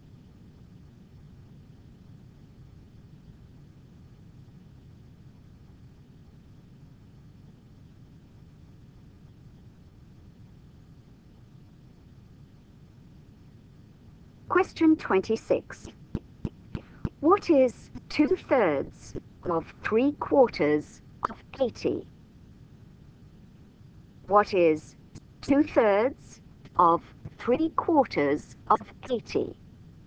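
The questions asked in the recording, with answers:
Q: What is 2/3 of 3/4 of 80?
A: 40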